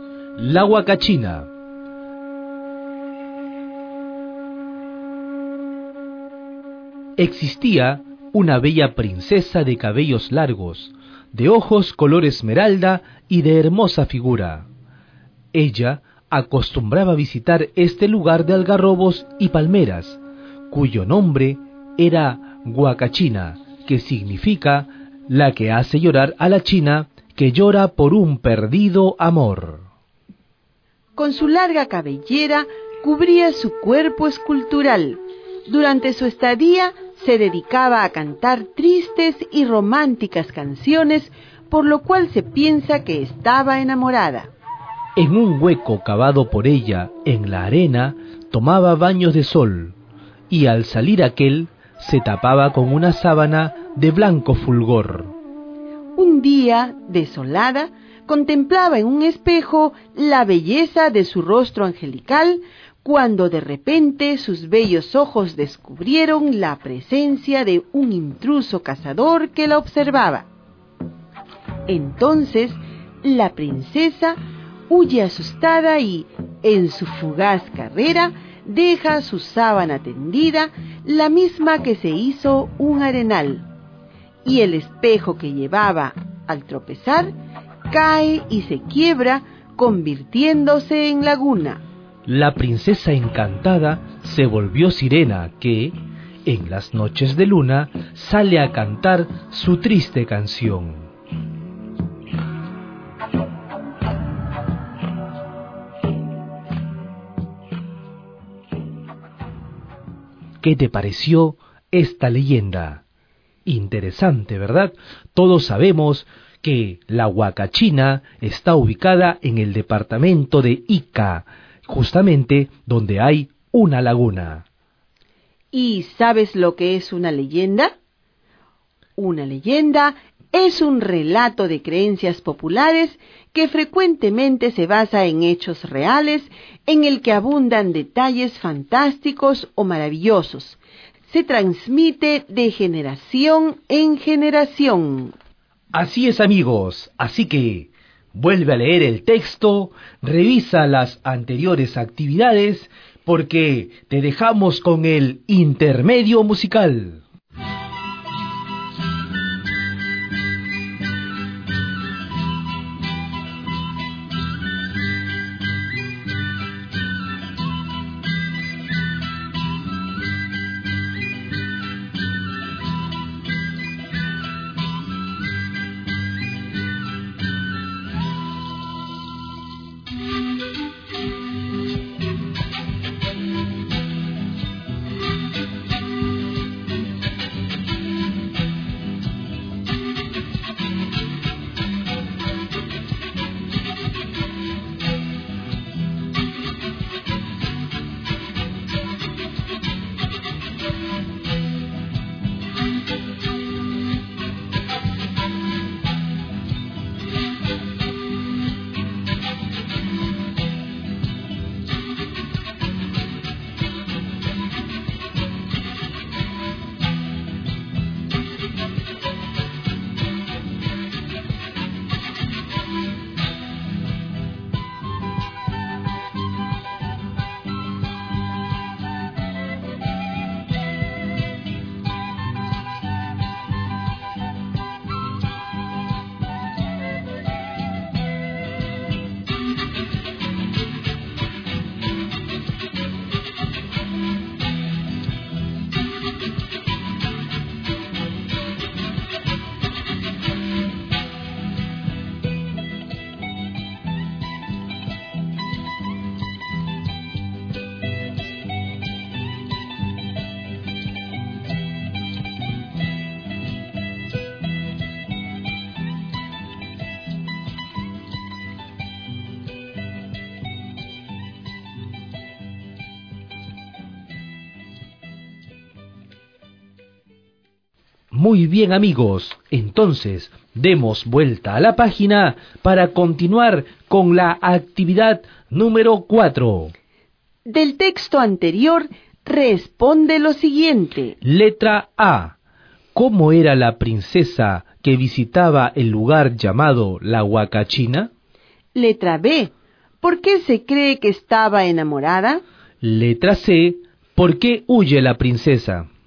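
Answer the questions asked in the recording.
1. Era bella, de cabellos largos, ojos color esmeralda y hermosa figura
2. Porque cantaba tristes y románticas canciones
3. Porque descubrió a un cazador intruso que la observaba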